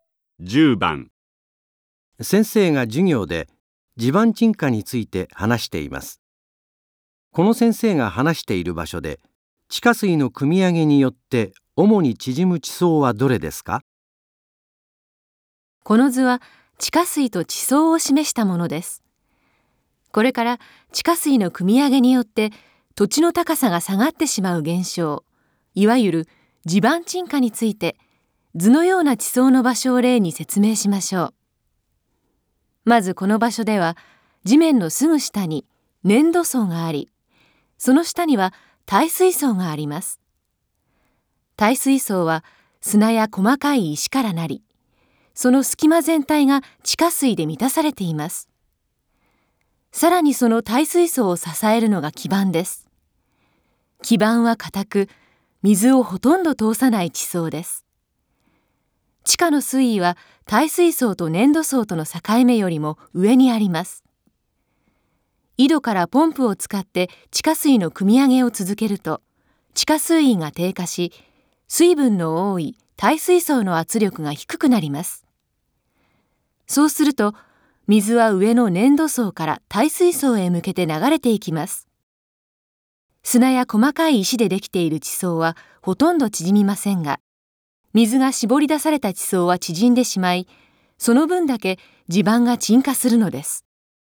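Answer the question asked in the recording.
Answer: 粘土層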